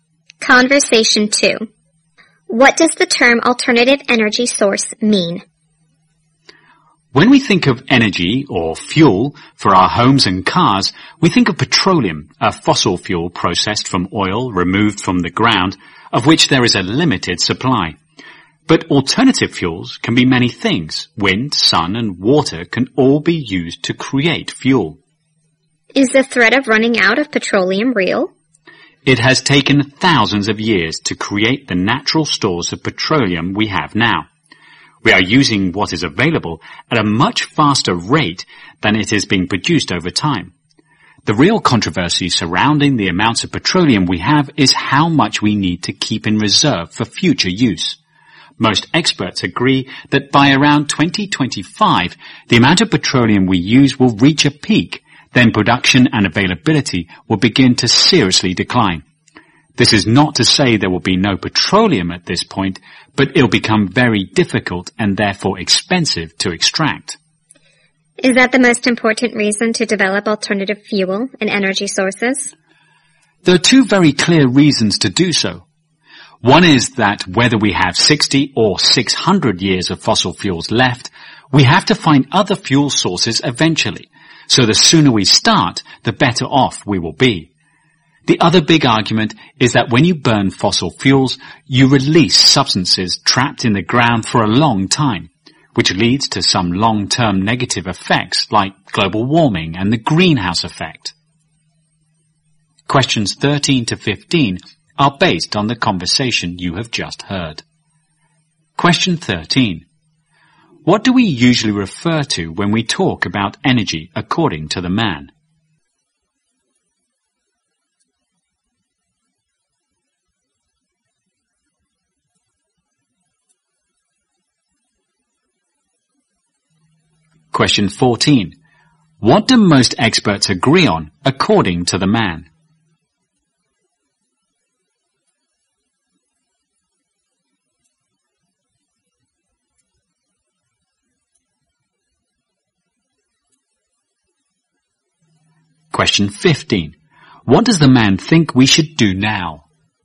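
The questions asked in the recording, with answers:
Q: What do we usually refer to when we talk about energy according to the man?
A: Petroleum, a fossil fuel

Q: What do most experts agree on according to the man?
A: Petroleum use will peak around 2025 and then production will decline

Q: What does the man think we should do now?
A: Start developing alternative fuel sources as soon as possible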